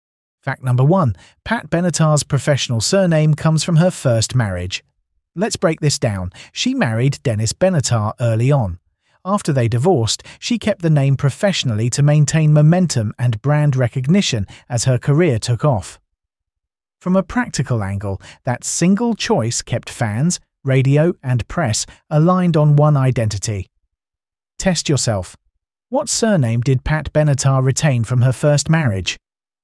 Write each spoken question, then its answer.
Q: What surname did Pat Benatar retain from her first marriage?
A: Correct answer, Benatar